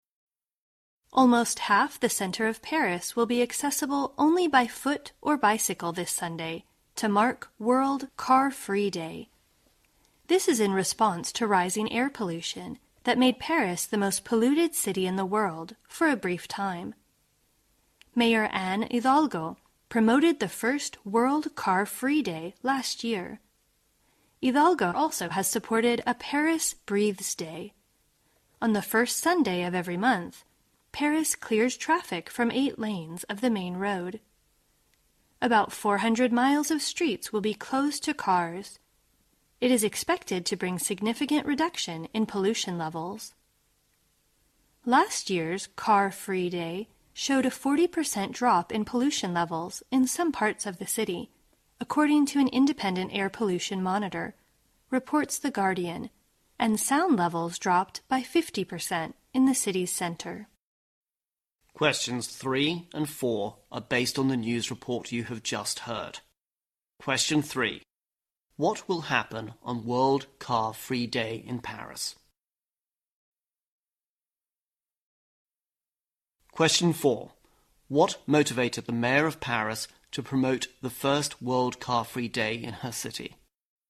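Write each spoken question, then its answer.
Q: What will happen on World Car Free Day in Paris?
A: Almost half the city center will be accessible only by foot or bicycle.

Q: What motivated the mayor of Paris to promote the first World Car Free Day in her city?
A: Rising air pollution, which briefly made Paris the world's most polluted city.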